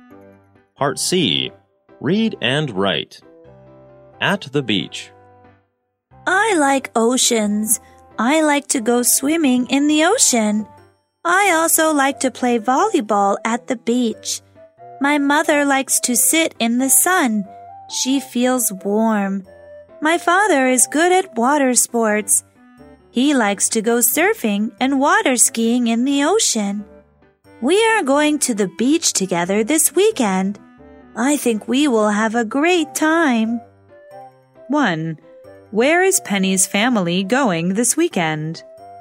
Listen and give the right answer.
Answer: They are going to the beach.